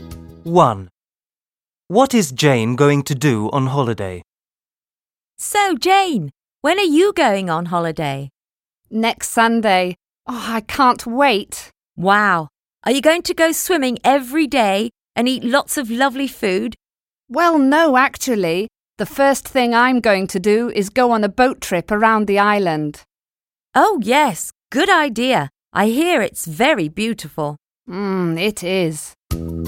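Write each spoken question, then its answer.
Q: What is Jane going to do on holiday?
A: Go on a boat trip around the island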